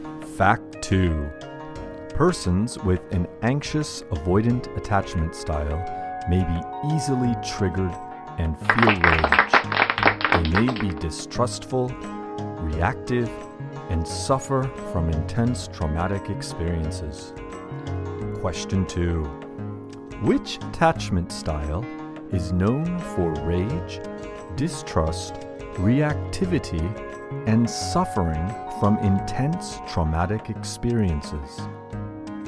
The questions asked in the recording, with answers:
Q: Which attachment style is known for rage, distrust, reactivity, and suffering from intense traumatic experiences.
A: Yes, persons with anxious avoidant attachment style may be easily triggered and feel rage.